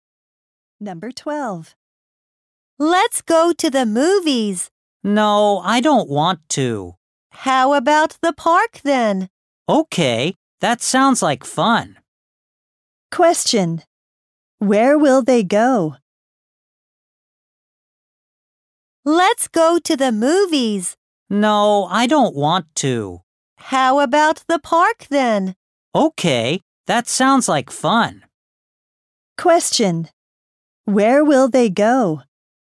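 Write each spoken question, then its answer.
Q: Where will they go?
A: To the park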